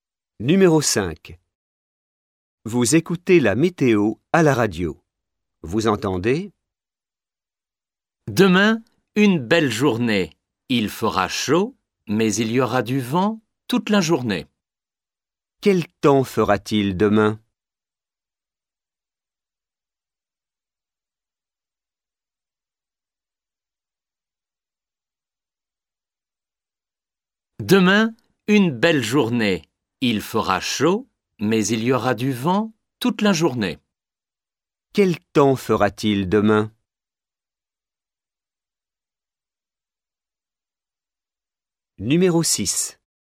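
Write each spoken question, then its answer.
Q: Quel temps fera-t-il demain?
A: Chaud avec du vent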